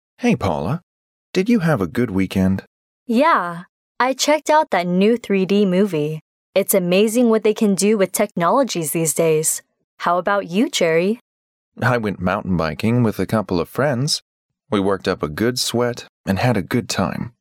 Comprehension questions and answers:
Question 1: How did Jerry spend his weekend?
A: He went mountain biking with some friends.

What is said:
M: Hey, Paula. Did you have a good weekend?
W: Yeah...I checked out that new 3D movie. It's amazing what they can do with technologies these days! How about you, Jerry?
M: I went mountain biking with a couple of friends. We worked up a good sweat and had a good time.